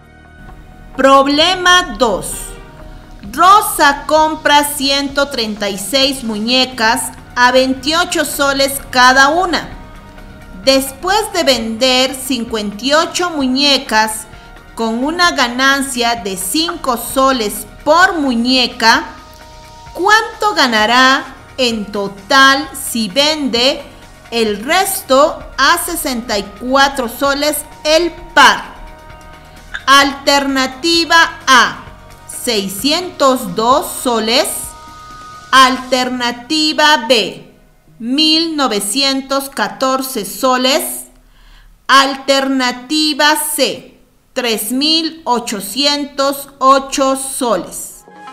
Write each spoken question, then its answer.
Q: ¿cuánto ganará en total si vende el resto a 64 soles el par?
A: La respuesta correcta es la alternativa A,